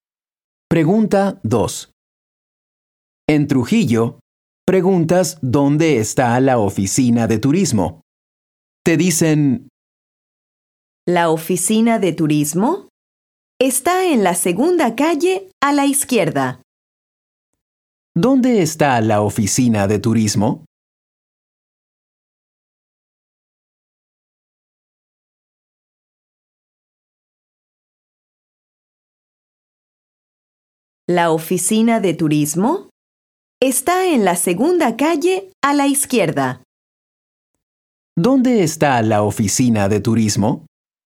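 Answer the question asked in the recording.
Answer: En la segunda calle a la izquierda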